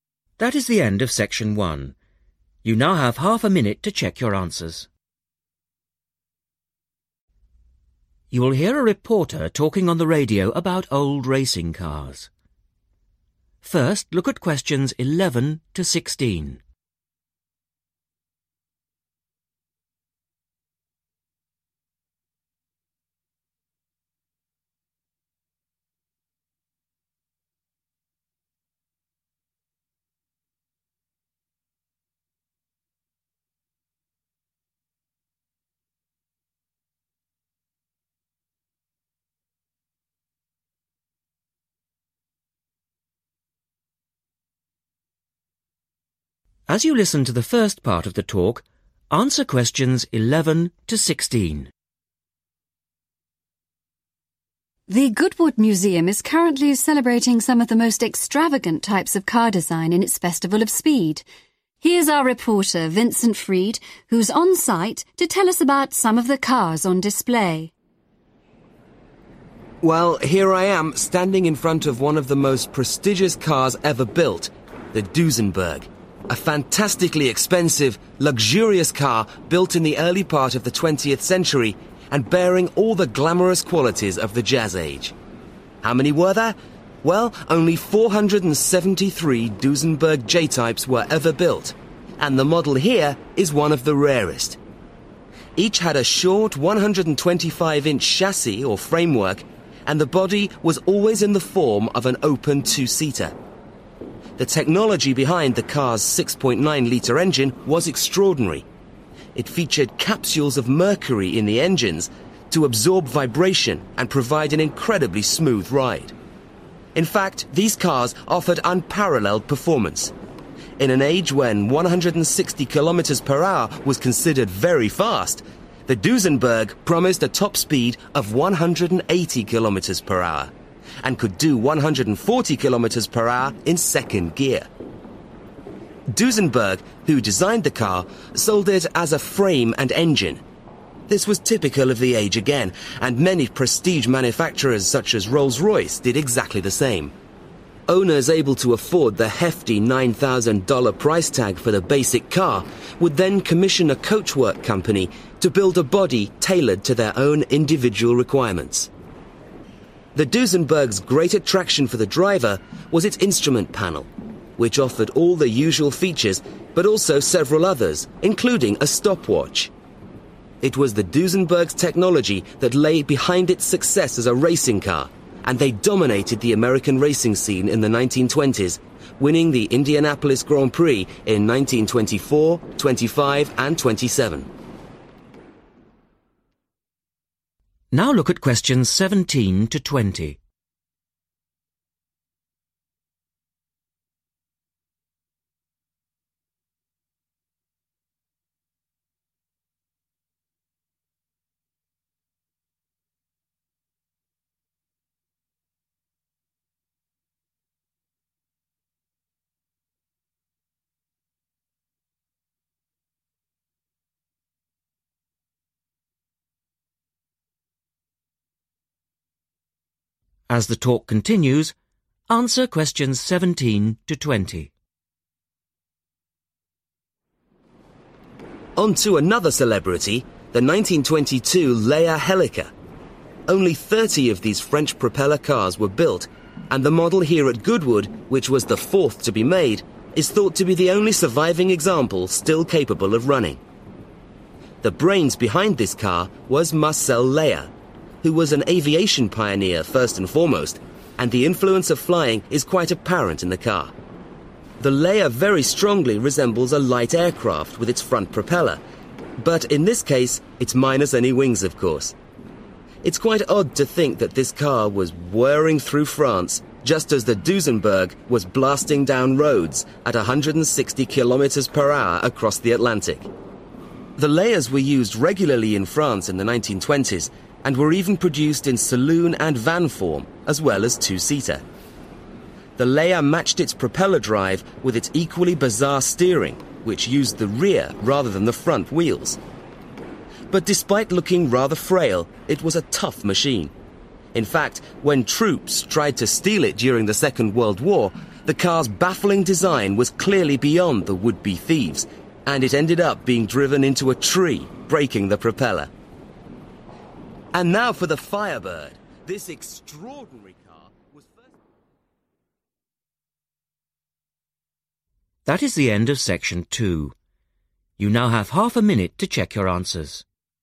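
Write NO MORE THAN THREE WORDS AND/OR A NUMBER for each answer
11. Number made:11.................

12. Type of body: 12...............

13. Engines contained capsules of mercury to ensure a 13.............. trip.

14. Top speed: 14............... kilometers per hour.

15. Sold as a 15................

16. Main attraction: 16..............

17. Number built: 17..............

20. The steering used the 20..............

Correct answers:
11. 473
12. open two-seater
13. smooth
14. 180
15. frame and engine
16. instrument panel
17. 30
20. rear wheels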